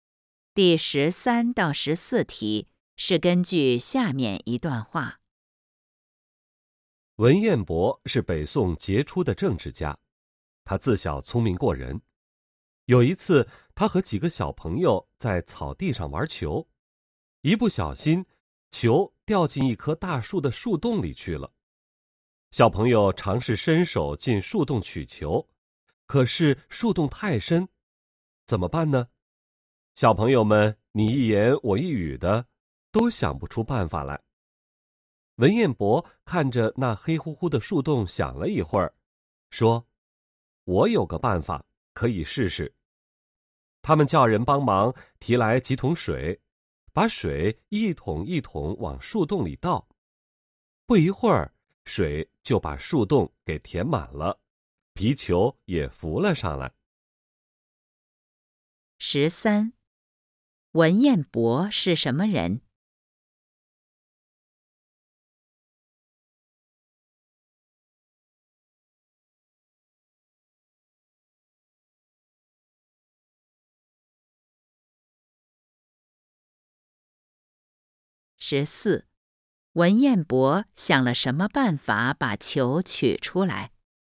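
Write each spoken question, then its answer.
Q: 文彦博是什么人?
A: 北宋杰出的政治家

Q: 文彦博想了什么办法把球取出来?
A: 往树洞里倒水,让球浮上来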